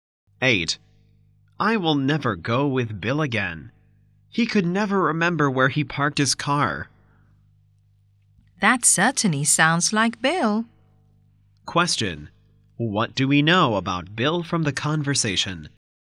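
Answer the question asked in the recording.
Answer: He is forgetful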